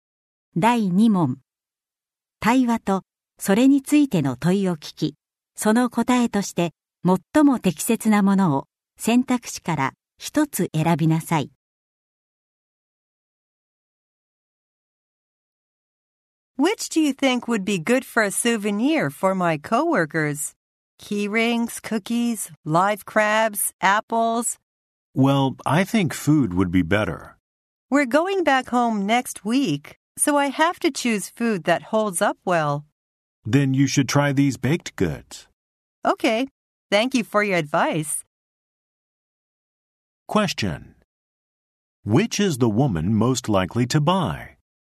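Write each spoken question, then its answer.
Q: Which is the woman most likely to buy?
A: Cookies (baked goods)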